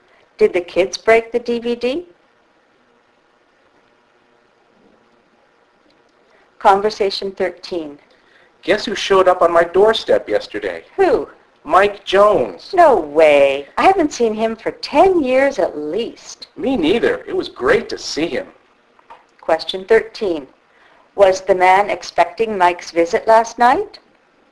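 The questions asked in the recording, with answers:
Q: Was the man expecting Mike's visit last night?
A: No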